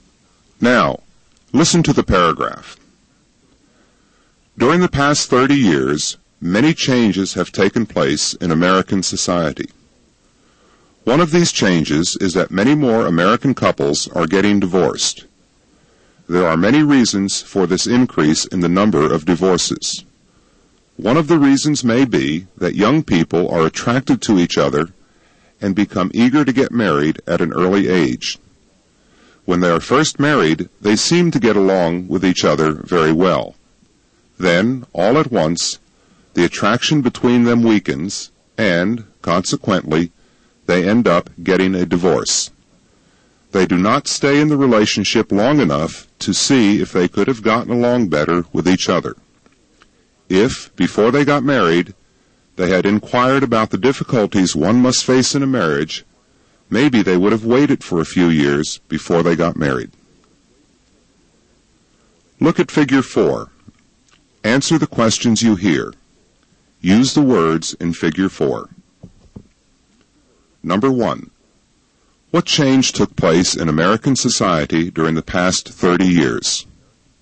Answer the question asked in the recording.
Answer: Many more American couples are getting divorced.